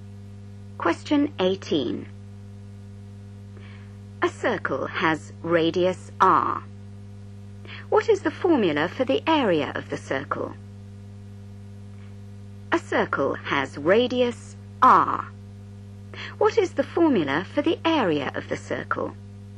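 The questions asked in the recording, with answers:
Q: What is the formula for the area of the circle?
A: A = πR2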